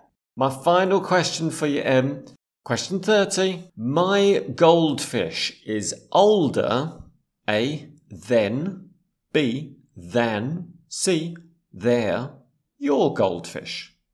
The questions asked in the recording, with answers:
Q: My goldfish is older, A, than, B, than, C, their, your goldfish.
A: A, my goldfish is older than your goldfish.